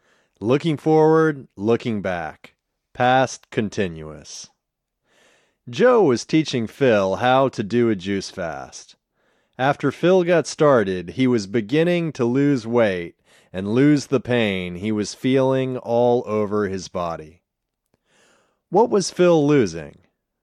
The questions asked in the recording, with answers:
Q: What was Phil losing?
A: Phil was losing weight and losing the pain he was feeling all over his body.